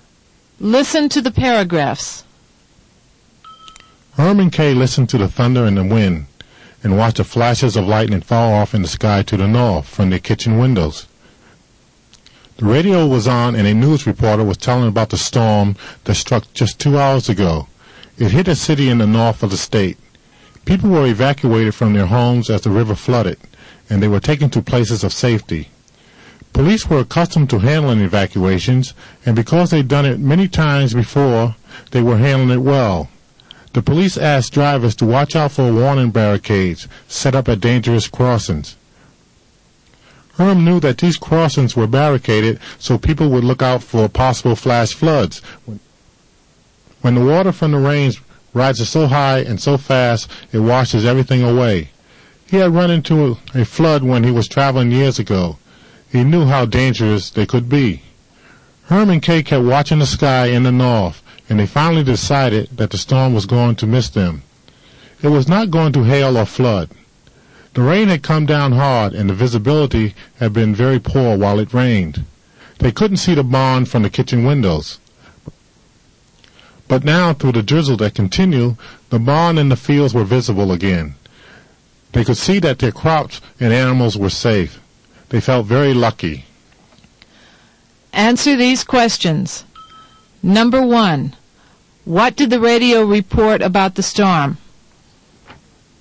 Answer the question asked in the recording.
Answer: The storm struck a city in the north of the state.